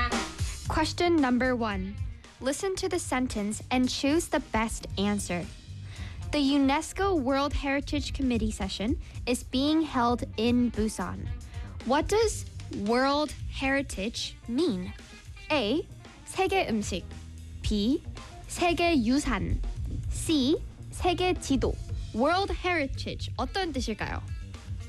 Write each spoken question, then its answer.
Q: What does World Heritage mean?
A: That's right. B. 네. 네 세계 유산입니다.